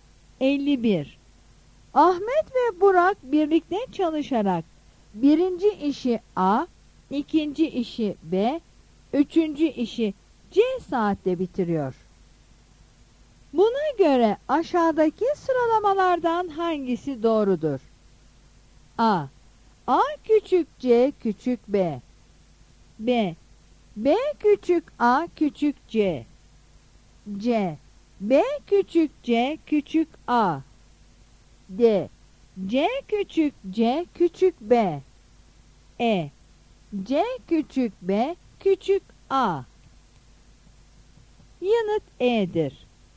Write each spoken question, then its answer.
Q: Buna göre aşağıdaki sıralamalardan hangisi doğrudur?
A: Yanıt E'dir.